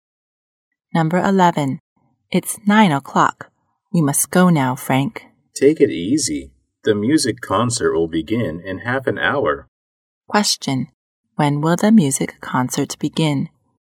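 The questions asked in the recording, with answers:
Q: Question.When will the music concert begin?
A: At 9:30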